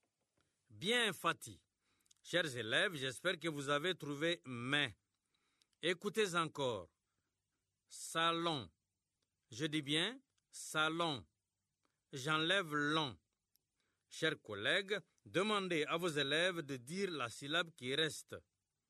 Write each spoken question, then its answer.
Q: Chers collègues, demandez à vos élèves de dire la syllabe qui reste.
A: Il reste ça.